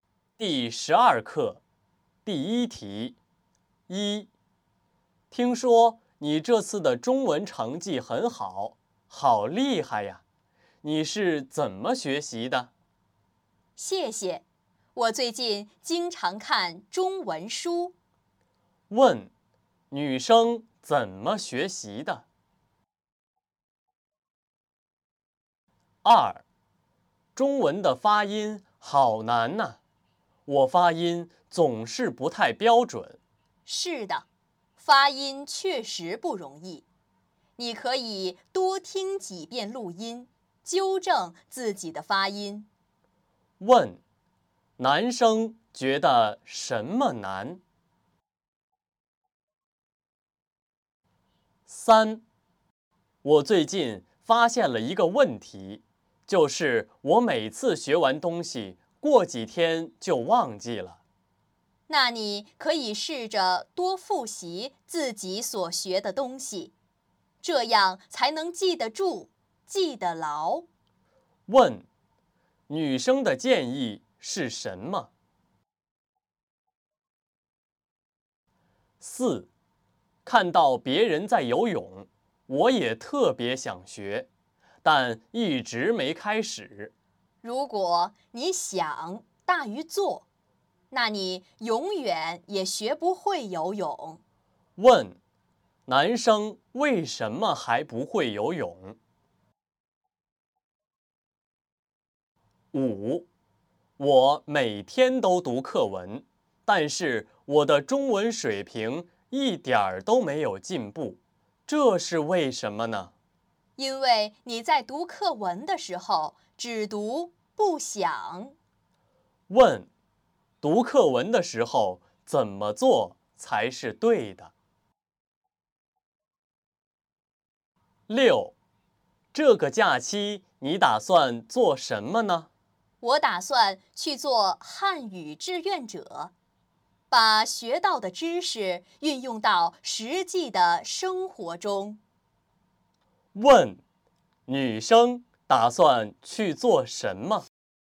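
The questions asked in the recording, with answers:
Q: 女生怎么学习的?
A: 经常看中文书

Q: 男生觉得什么难?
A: 中文的发音

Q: 女生的建议是什么?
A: 多复习所学的东西

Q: 男生为什么还不会游泳?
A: 想得多,做得少,一直没开始

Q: 读课文的时候怎么做才是对的?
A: 边读边想

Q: 女生打算去做什么?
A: 做汉语志愿者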